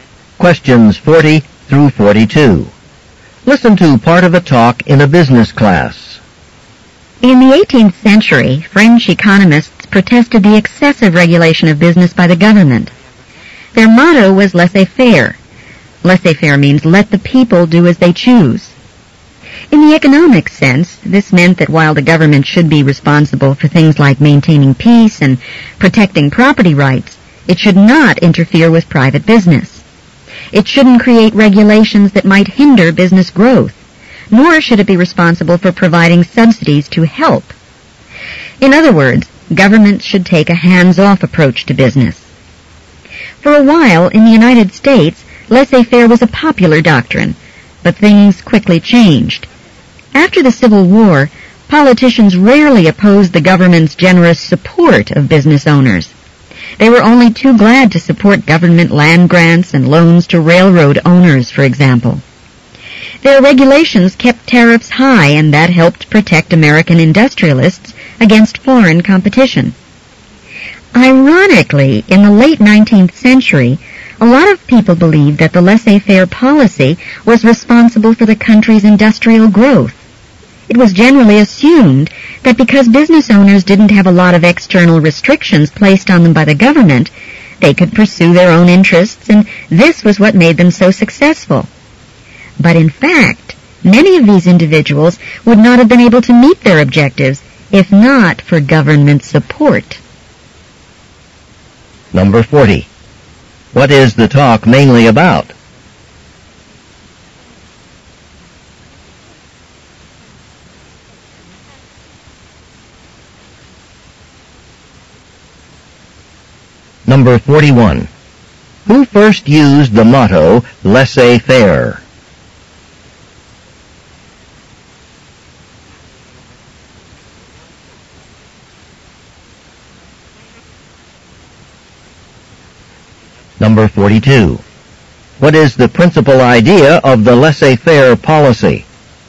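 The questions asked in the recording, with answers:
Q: What is the talk mainly about?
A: The laissez-faire economic policy.

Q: Who first used the motto, laissez-faire?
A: 18th-century French economists.

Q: What is the principal idea of the laissez-faire policy?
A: Government should not interfere with private business.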